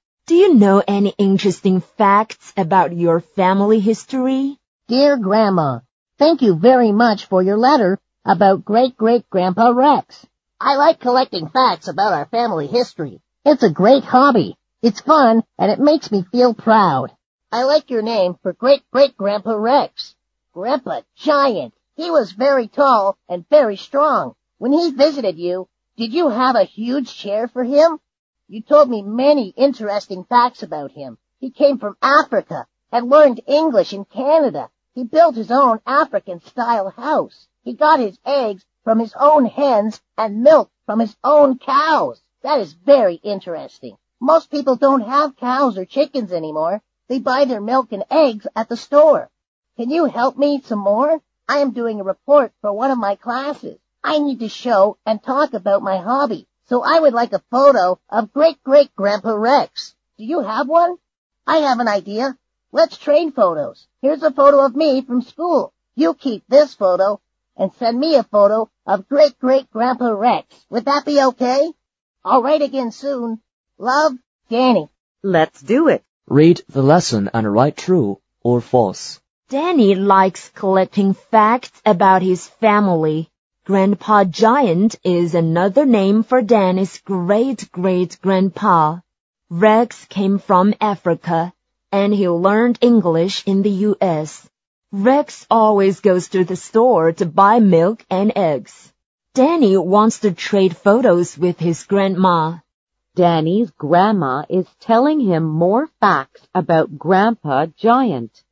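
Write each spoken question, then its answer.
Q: Danny likes collecting facts about his family.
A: True

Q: Grandpa Giant is another name for Danny's great-great-grandpa.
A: True

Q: Rex came from Africa, and he learned English in the U.S.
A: False

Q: Rex always goes to the store to buy milk and eggs.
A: False

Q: Danny wants to trade photos with his grandma.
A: True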